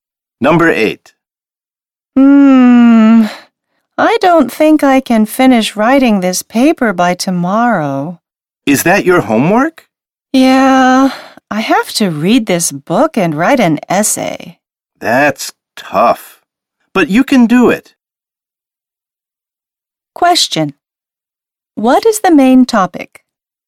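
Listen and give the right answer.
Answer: Homework: reading a book and writing an essay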